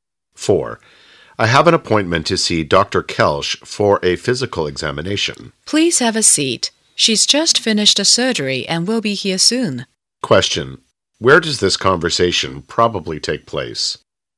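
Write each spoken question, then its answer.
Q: Where does this conversation probably take place?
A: At a doctor's office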